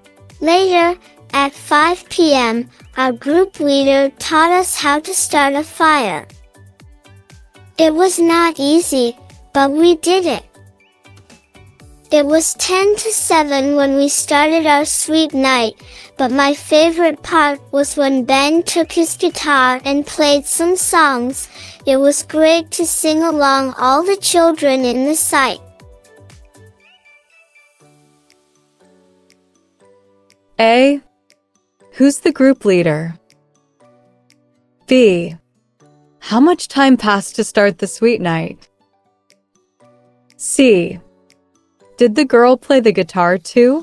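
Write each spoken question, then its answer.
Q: Did the girl play the guitar too?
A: No, Ben played the guitar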